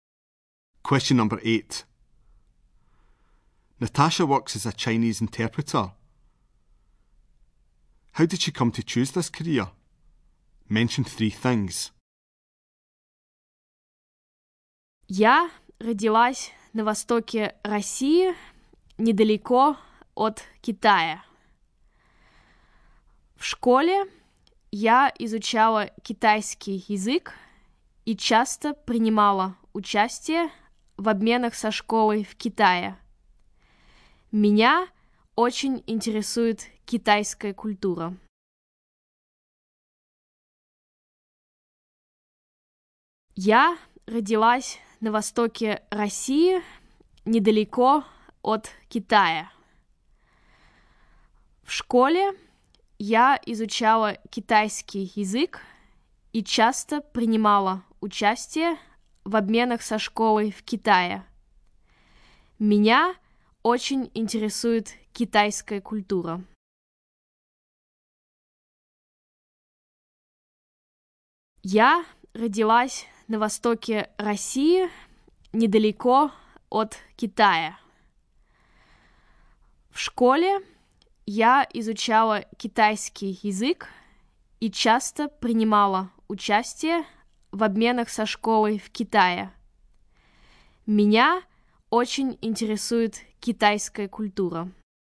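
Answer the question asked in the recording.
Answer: Born in eastern Russia near China; studied Chinese at school and went on exchanges to China; interested in Chinese culture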